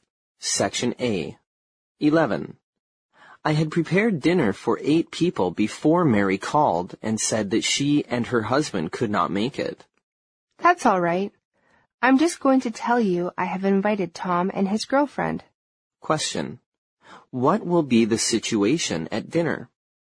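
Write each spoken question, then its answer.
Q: What will be the situation at dinner?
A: There will still be eight people at dinner.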